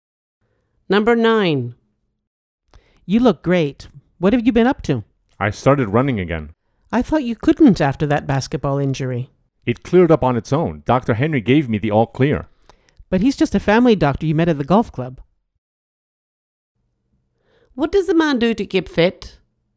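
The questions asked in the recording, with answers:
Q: What does a man do to keep fit?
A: Running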